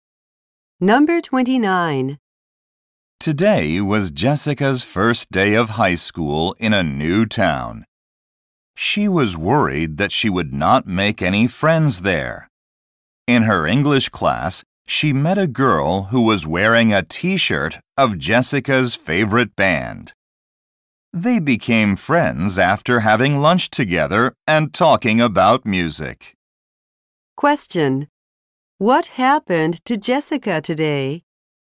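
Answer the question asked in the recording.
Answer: She made a friend who likes the same band.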